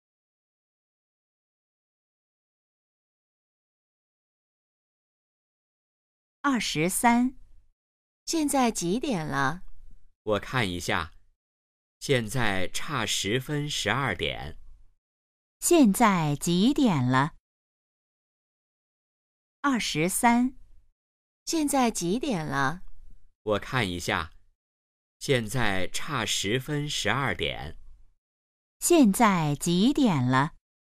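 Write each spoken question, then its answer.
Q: 现在几点了?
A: 十一点五十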